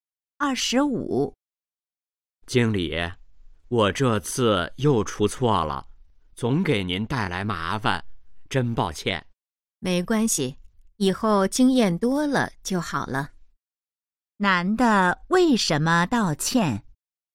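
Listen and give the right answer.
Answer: 他又出错了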